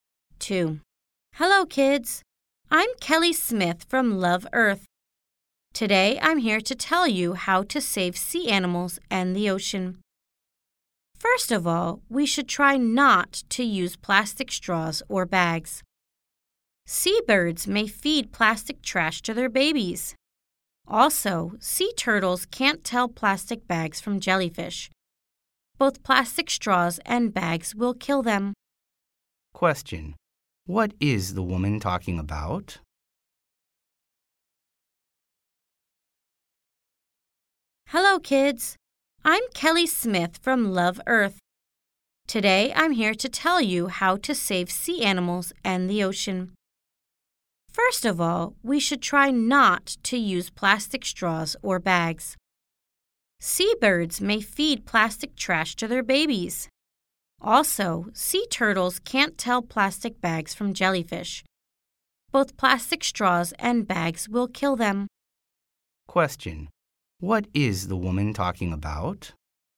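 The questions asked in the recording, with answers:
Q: What is the woman talking about?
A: How to save sea animals and the ocean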